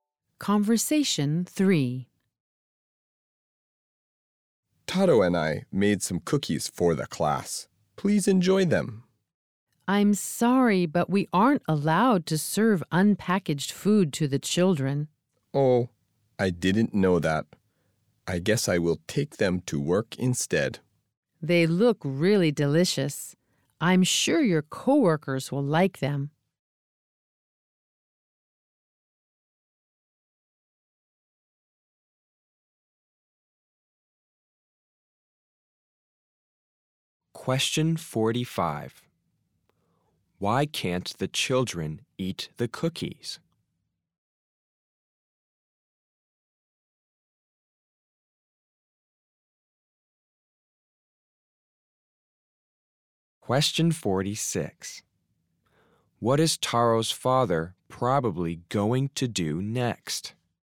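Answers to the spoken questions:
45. Unpackaged food can't be served to the children
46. Take the cookies to work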